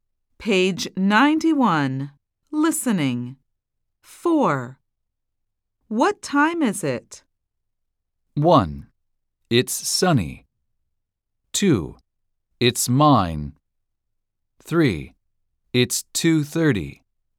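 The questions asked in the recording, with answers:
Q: What time is it?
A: 3: It's 2:30.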